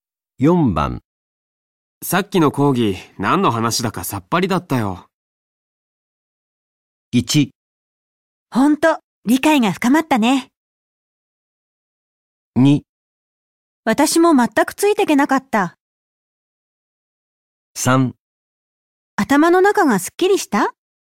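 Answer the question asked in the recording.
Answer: 2: 私も全くついていけなかった。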